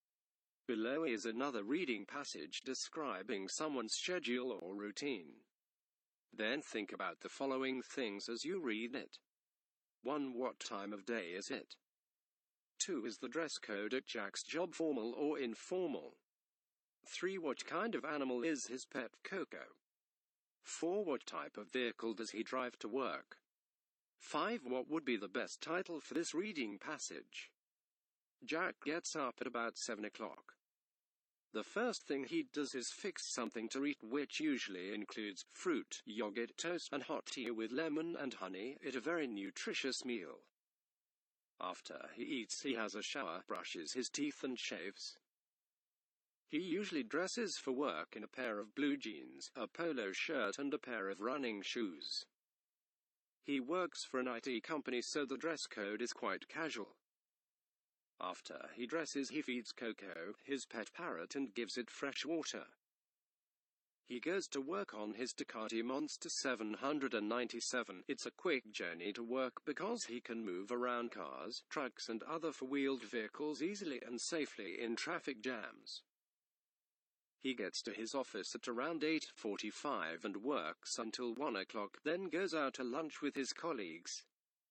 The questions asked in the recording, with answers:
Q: What time of day is it?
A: his routine takes place in the morning

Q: What kind of animal is his pet Coco?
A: He feeds his pet bird.

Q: What type of vehicle does he drive to work?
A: He goes to work on his motorcycle.

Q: What would be the best title for this reading passage?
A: The best title for this passage may be Jack's Morning Routine